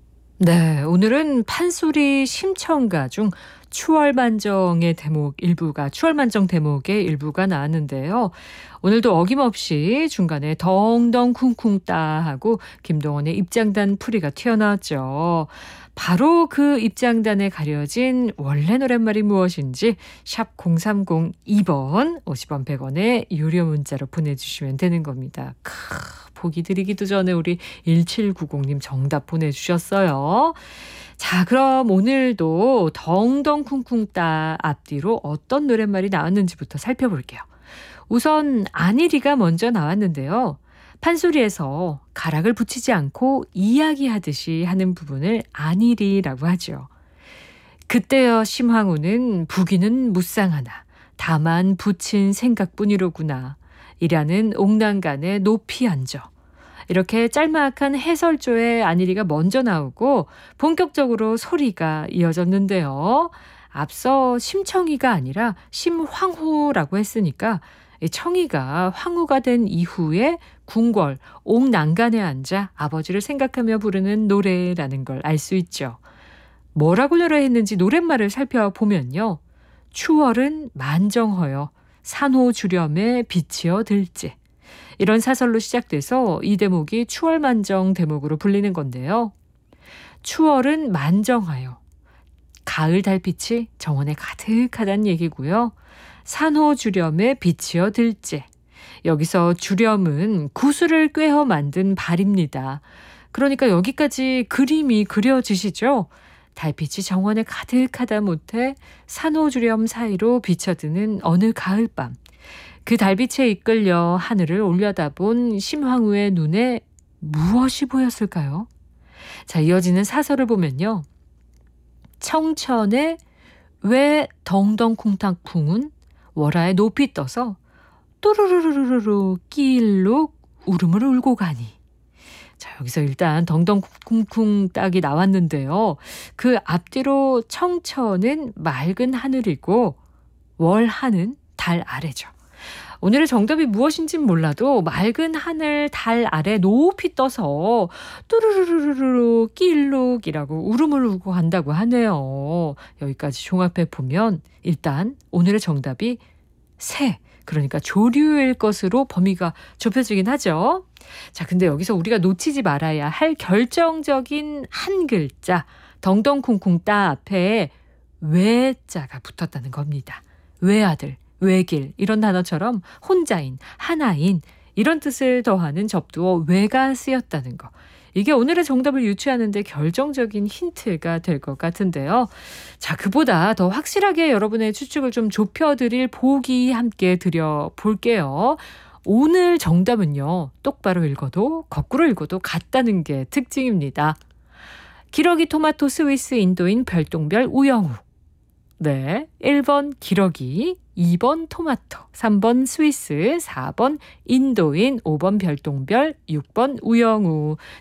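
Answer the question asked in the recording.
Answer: 1: 기러기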